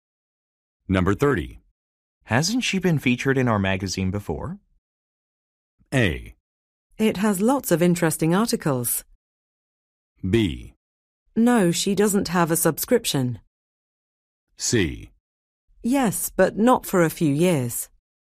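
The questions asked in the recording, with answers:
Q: Hasn't she been featured in our magazine before?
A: C: Yes, but not for a few years.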